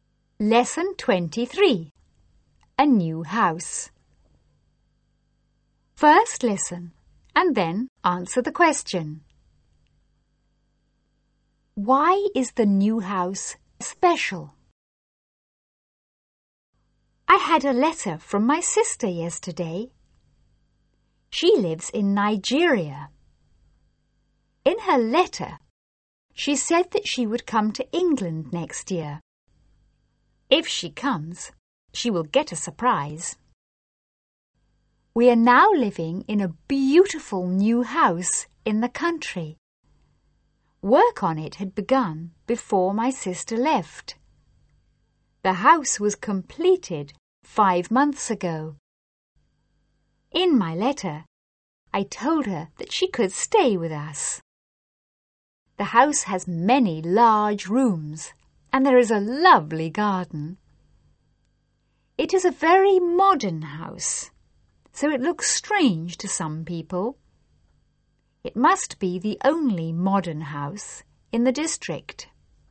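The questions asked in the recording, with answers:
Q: Why is the new house special?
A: It is very modern, probably the only modern house in the district.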